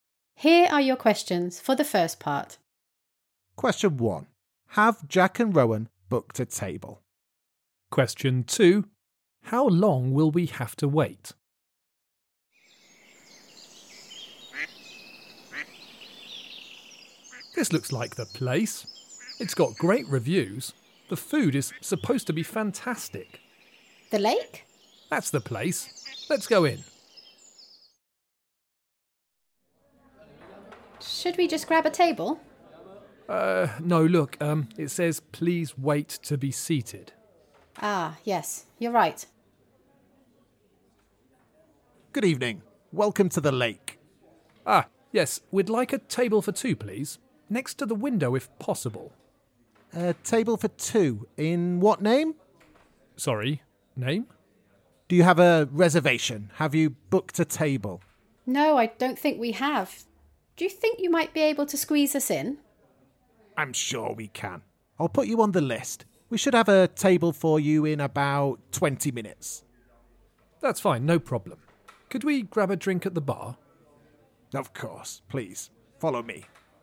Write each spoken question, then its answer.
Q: Have Jack and Rowan booked a table?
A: The answer was no, we hadn't booked a table.

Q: How long will we have to wait?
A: The answer is about 20 minutes.